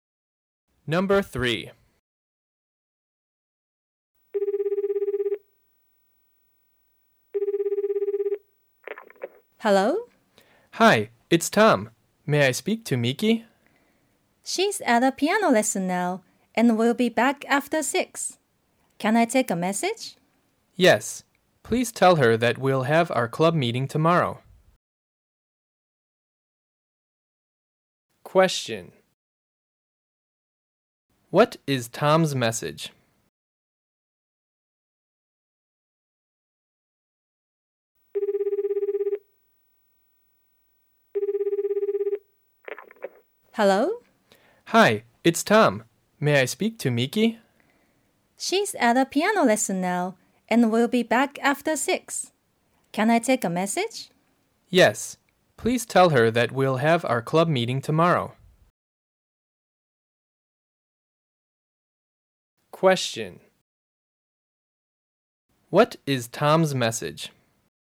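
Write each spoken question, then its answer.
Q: What is Tom's message?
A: They will have their club meeting tomorrow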